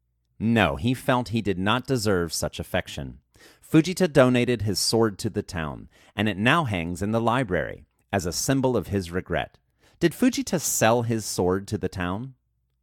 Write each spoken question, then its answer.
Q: Did Fujita sell his sword to the town?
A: No, Fujita did not sell his sword to the town.